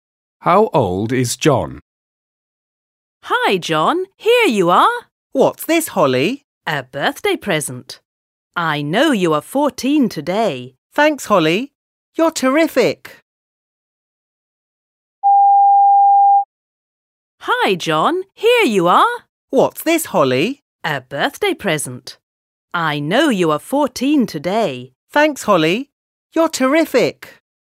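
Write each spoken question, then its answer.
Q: How old is John?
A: 14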